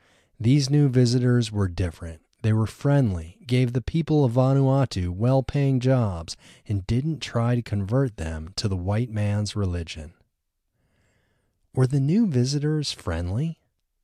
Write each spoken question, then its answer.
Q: Were the new visitors friendly?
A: Yes, the new visitors were friendly.